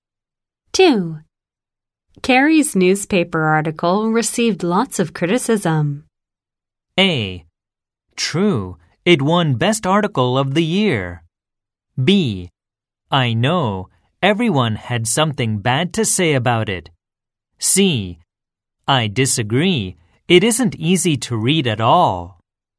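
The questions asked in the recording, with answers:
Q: Carrie's newspaper article received lots of criticism.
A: B: I know, everyone had something bad to say about it.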